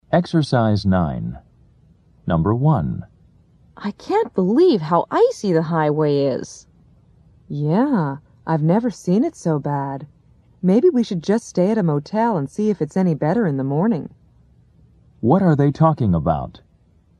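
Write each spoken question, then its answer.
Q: What are they talking about?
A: The icy road conditions; they may stay at a motel overnight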